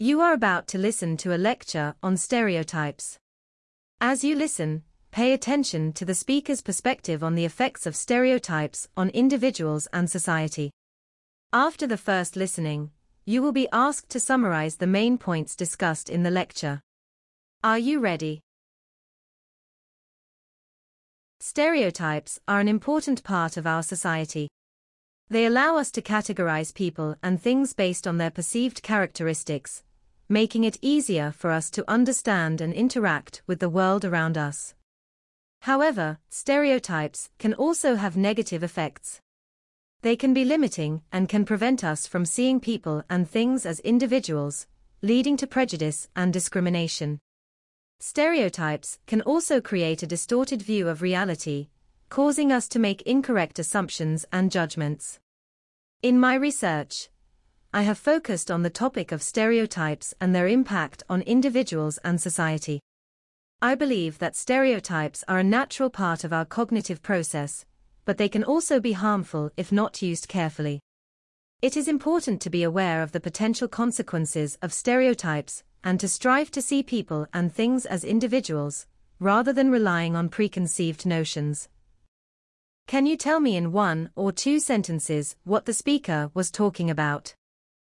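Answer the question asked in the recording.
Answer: Stereotypes: they help us categorize and understand the world but can cause prejudice, discrimination and wrong judgments, so we should see people as individuals.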